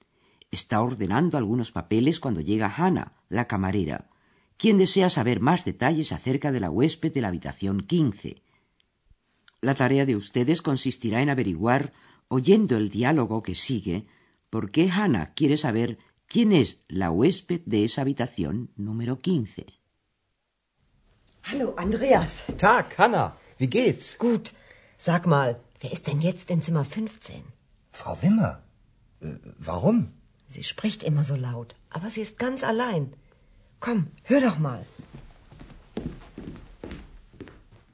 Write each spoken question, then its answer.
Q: La tarea de ustedes consistirá en averiguar, oyendo el diálogo que sigue, por qué Hannah quiere saber quién es la huésped de esa habitación número 15.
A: Hannah desea saber quién es la persona que está hospedada en la habitación número 15, porque se ha dado cuenta de que allí dentro hay una mujer que siempre habla en voz alta.